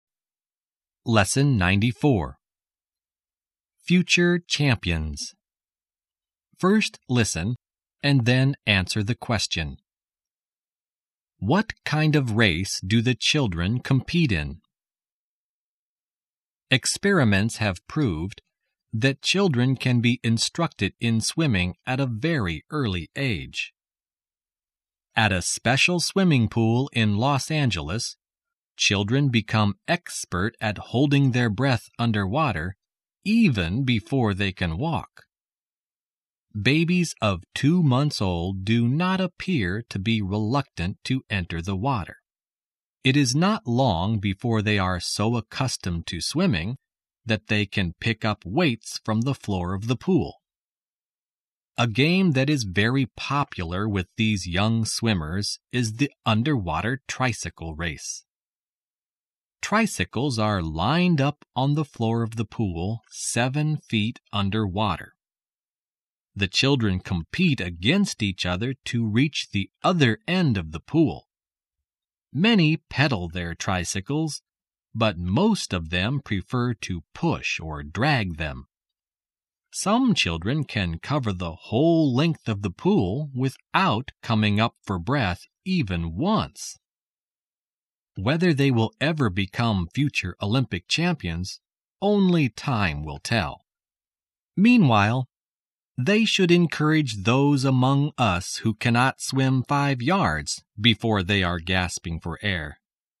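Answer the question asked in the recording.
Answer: An underwater tricycle race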